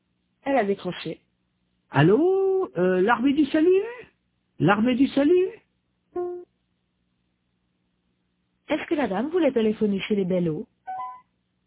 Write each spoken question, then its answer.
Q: Est-ce que la dame voulait téléphoner chez les Bellot?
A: Non, elle voulait l'armée du salut.